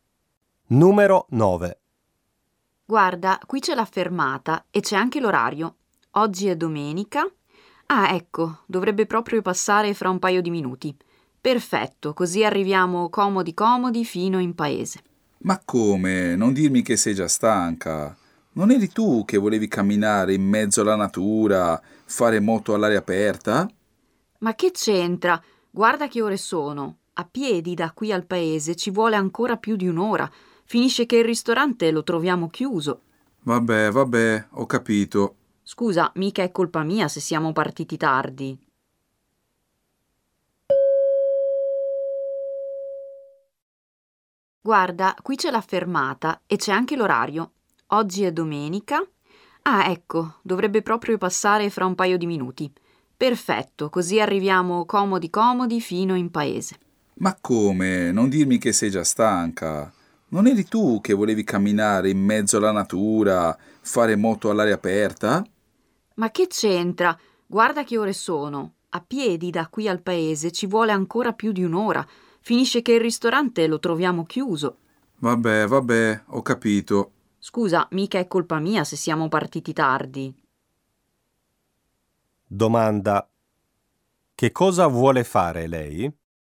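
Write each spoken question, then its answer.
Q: che cosa vuole fare lei?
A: Prendere l'autobus per arrivare in paese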